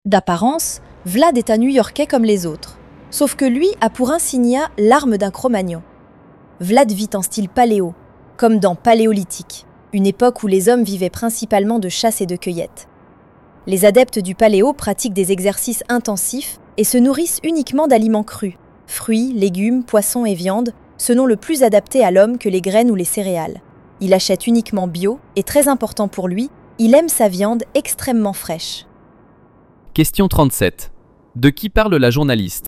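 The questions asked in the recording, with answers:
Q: De qui parle la journaliste ?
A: De Vlad, un New-Yorkais qui vit en style paléo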